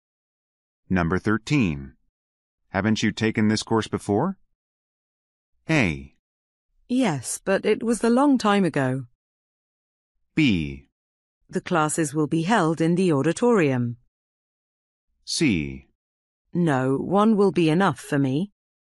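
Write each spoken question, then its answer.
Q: Haven't you taken this course before?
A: A: Yes, but it was a long time ago.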